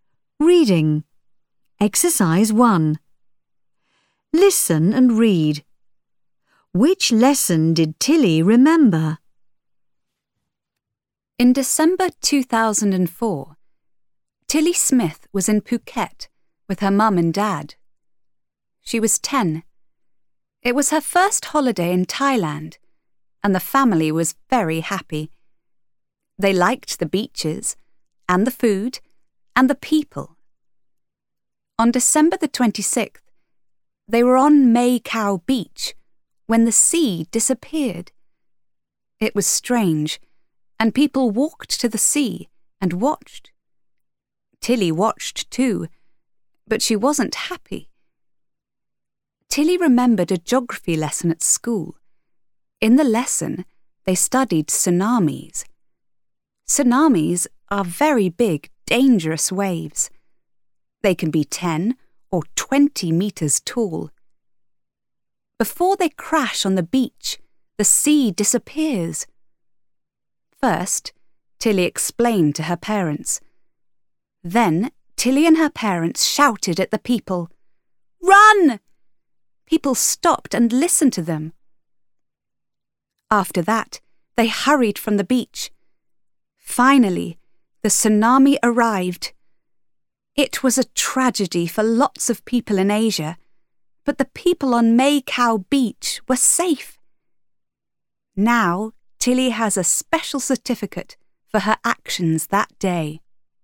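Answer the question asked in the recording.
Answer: A geography lesson (about tsunamis)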